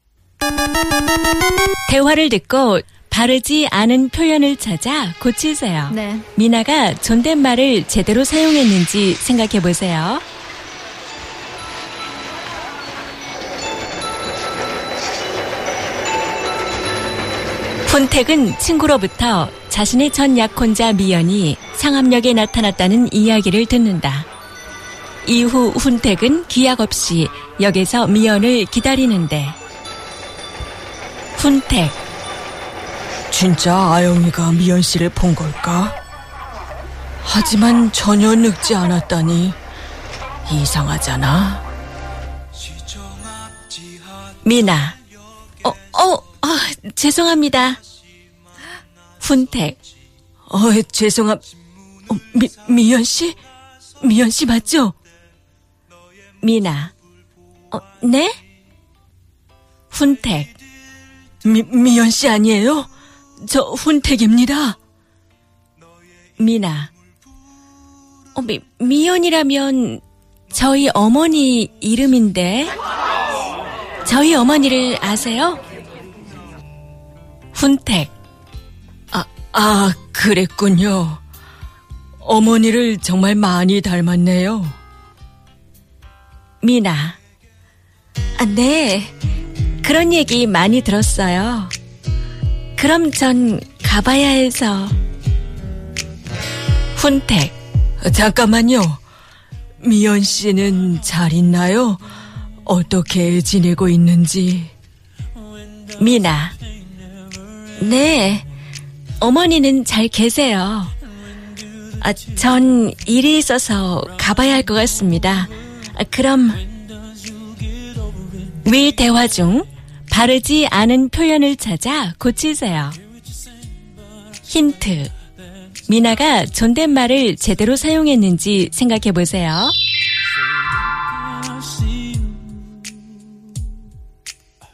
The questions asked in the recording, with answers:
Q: 그럼 위 대화 중 바르지 않은 표현을 찾아 고치세요.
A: 이름 to 성함.